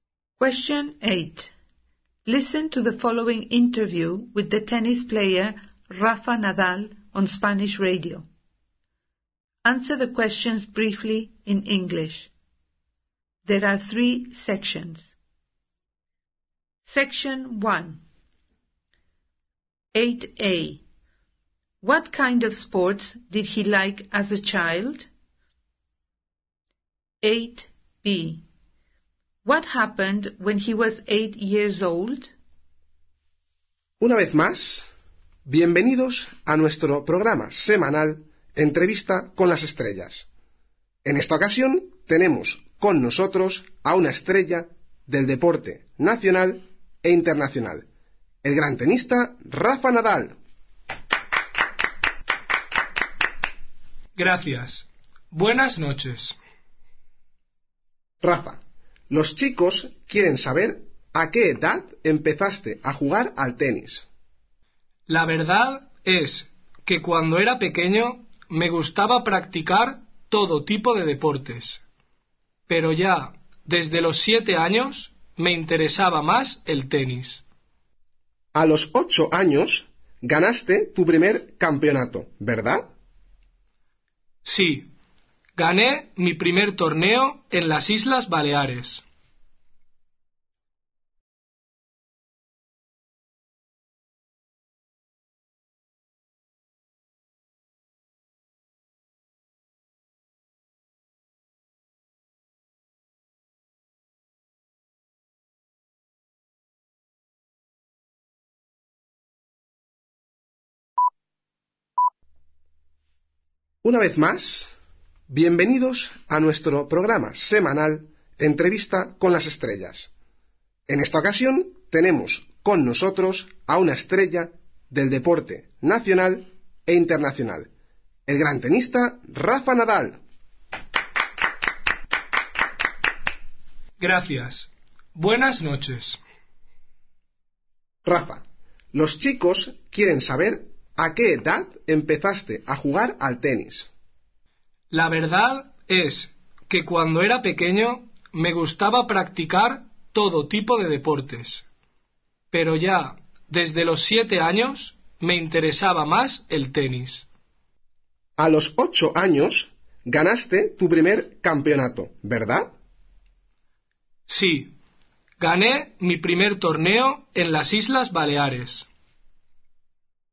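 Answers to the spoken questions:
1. All kinds of sports
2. He won his first tournament, in the Balearic Islands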